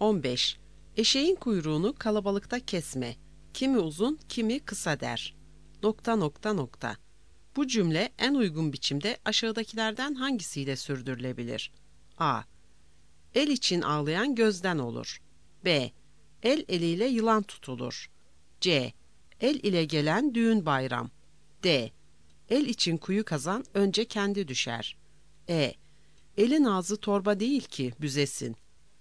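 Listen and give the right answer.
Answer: E: Elin ağzı torba değil ki büzesin.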